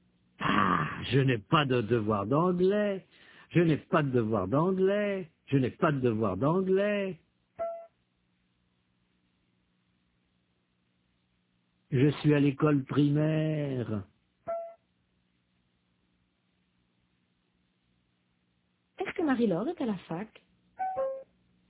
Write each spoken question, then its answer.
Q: Est-ce que Marie-Laure est à la fac?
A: Non, elle est à l'école primaire.